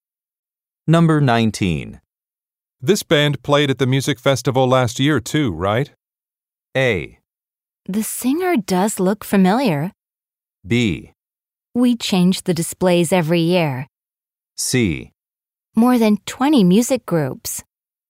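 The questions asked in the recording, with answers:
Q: This band played at the music festival last year too, right?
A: A: The singer does look familiar.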